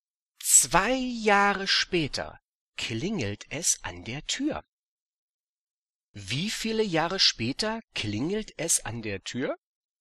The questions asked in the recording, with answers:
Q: Wie viele Jahre später klingelt es an der Tür?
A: 2 Jahre. 2 Jahre später klingelt es an der Tür.